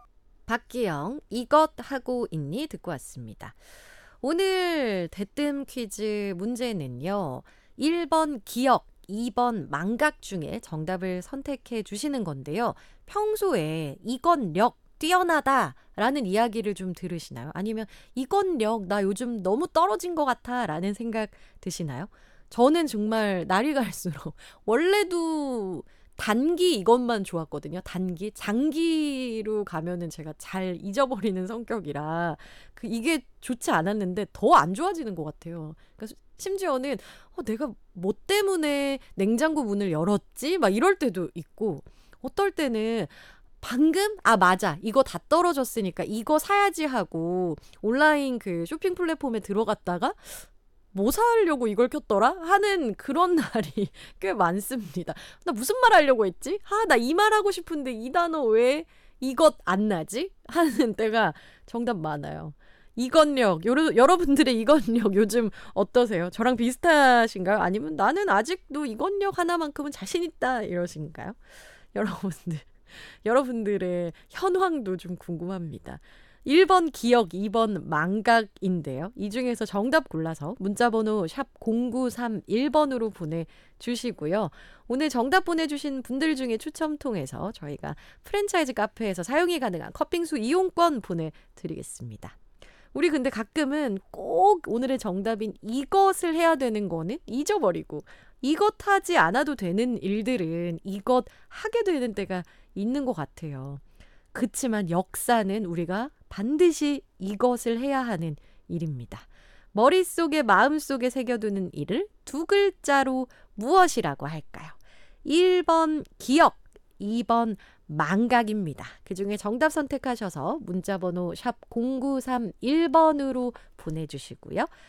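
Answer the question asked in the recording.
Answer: 1: 기억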